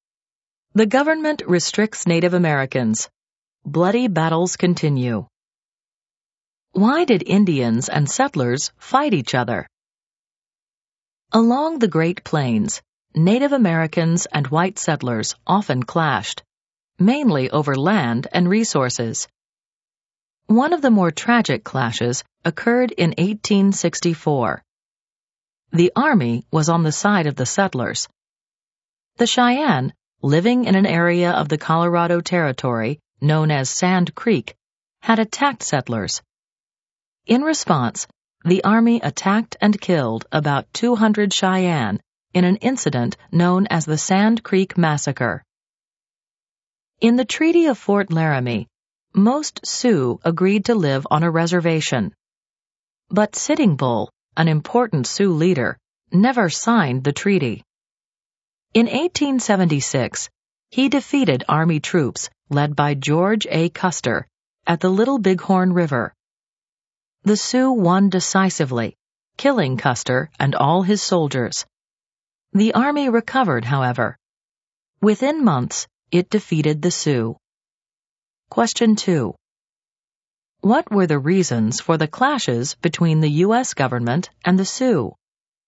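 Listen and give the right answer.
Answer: Conflict over land and resources; Sitting Bull never signed the Treaty of Fort Laramie to live on a reservation.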